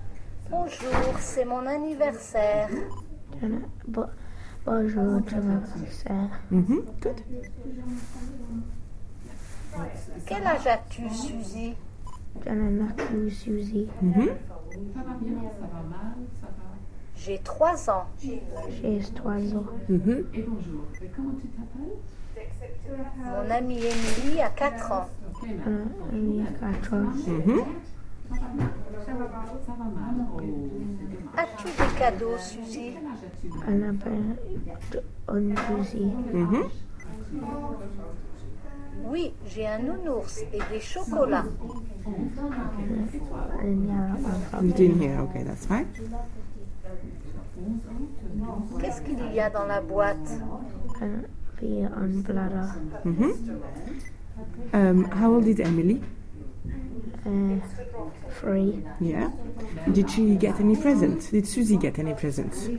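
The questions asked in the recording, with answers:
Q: Did Suzy get any presents?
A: Yes, a teddy bear and chocolates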